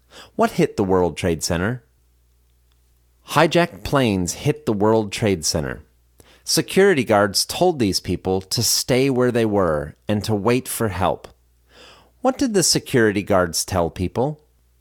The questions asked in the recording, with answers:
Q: What did the security guards tell people?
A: Security guards told people to stay where they were and to wait for help.